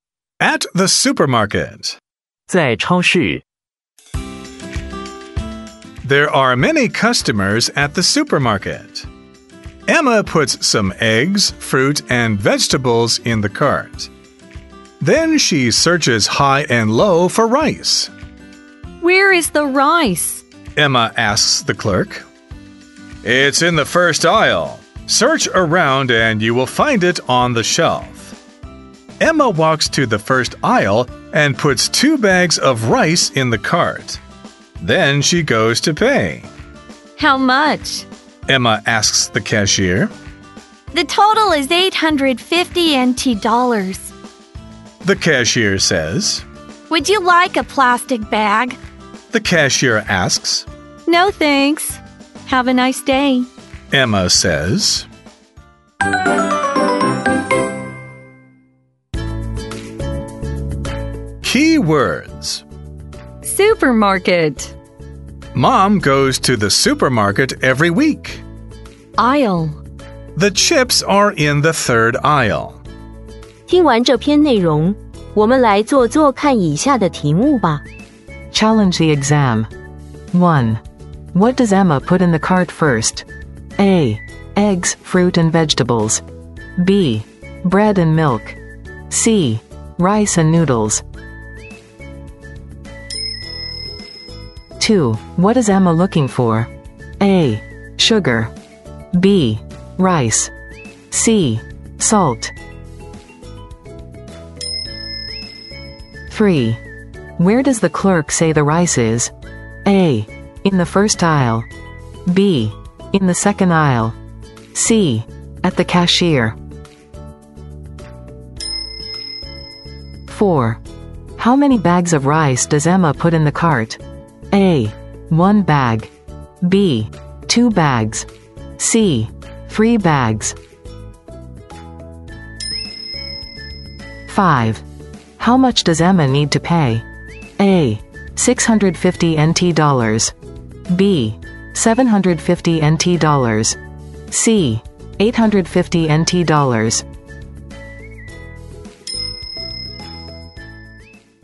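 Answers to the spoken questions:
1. A: Eggs, fruit and vegetables.
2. B: Rice.
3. A: In the first aisle.
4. B: Two bags.
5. C: 850 NT dollars.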